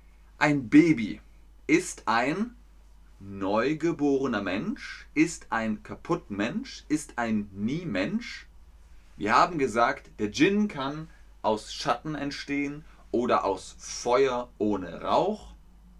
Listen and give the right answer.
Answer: Genau. Ein Baby ist ein neugeborener Mensch.